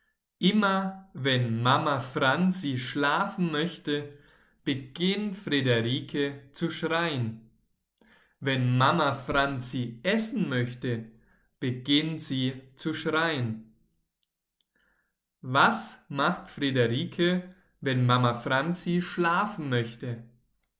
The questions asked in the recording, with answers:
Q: Was macht Friederike, wenn Mama Franzi schlafen möchte?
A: Sie beginnt zu schreien. Friederike beginnt zu schreien, wenn Mama Franzi schlafen möchte.